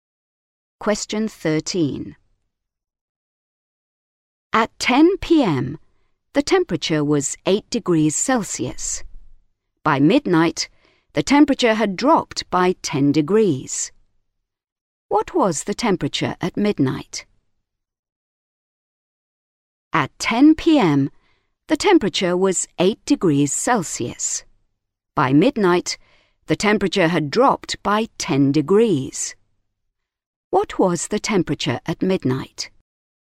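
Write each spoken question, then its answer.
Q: What was the temperature at midnight?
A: -2 degrees Celsius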